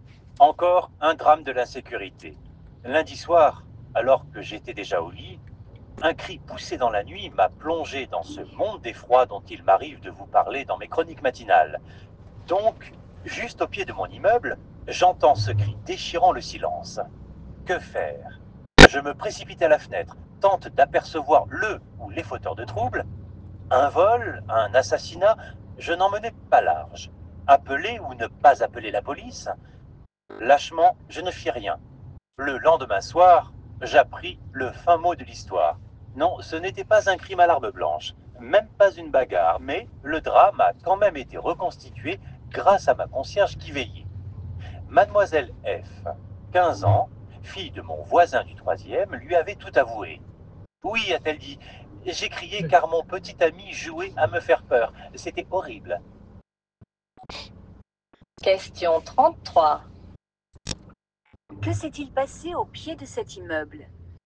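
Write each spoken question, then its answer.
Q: Que s'est-il passé au pied de cet immeuble?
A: Une jeune fille a crié parce que son petit ami jouait à lui faire peur.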